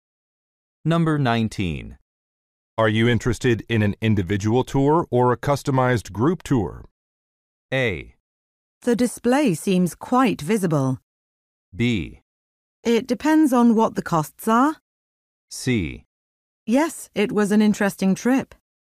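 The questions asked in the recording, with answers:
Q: Are you interested in an individual tour or a customized group tour?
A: B: It depends on what the costs are.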